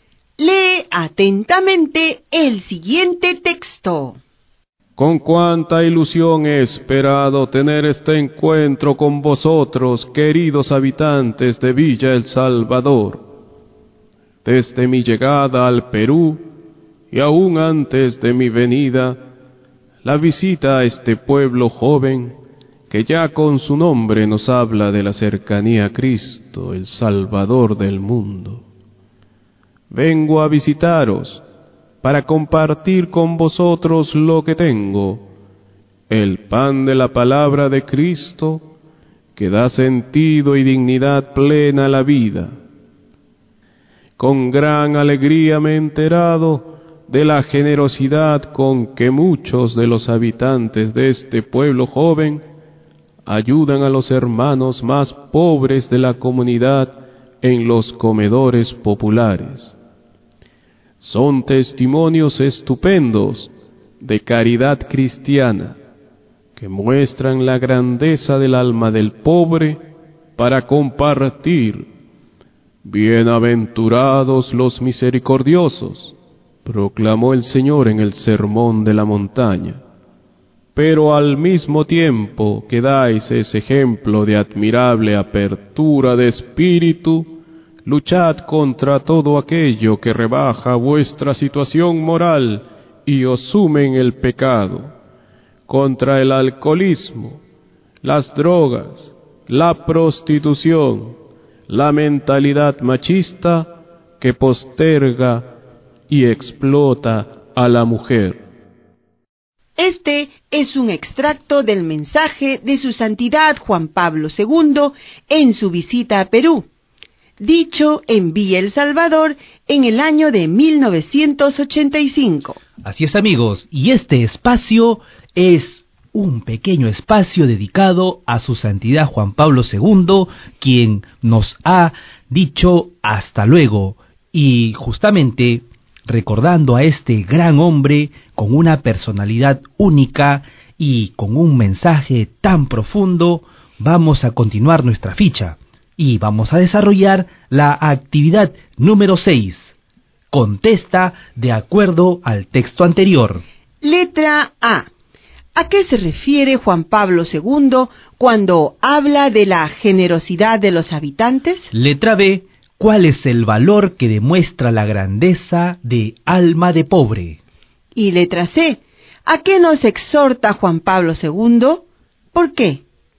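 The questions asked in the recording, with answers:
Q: ¿A qué se refiere Juan Pablo II cuando habla de la generosidad de los habitantes?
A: A que ayudan a los hermanos más pobres de la comunidad en los comedores populares

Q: ¿Cuál es el valor que demuestra la grandeza de alma de pobre?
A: La caridad cristiana (compartir)

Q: ¿A qué nos exhorta Juan Pablo II?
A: A luchar contra el alcoholismo, las drogas, la prostitución y la mentalidad machista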